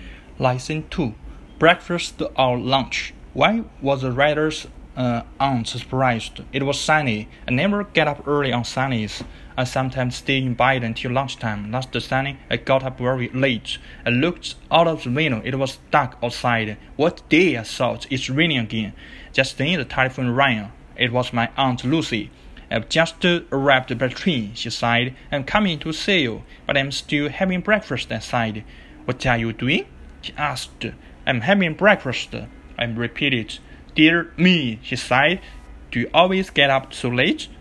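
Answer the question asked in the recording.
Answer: Because the writer was still having breakfast at 1 o'clock.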